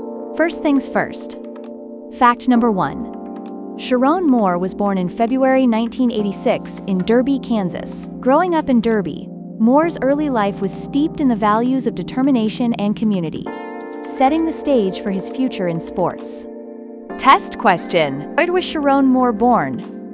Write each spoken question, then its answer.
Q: Where was Sharon Moore born?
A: Correct answer, Derby, Kansas.